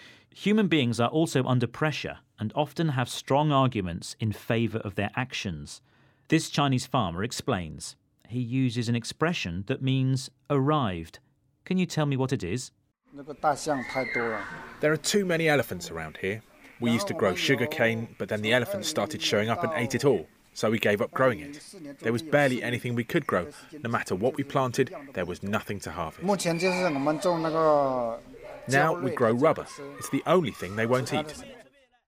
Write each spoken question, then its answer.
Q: He uses an expression that means arrived. Can you tell me what it is?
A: He said showing up. This means the elephants arrived.